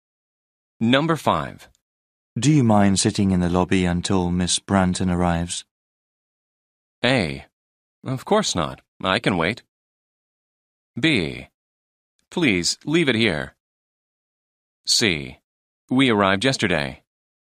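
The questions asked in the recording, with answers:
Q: Do you mind sitting in the lobby until Miss Branton arrives?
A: A: Of course not. I can wait.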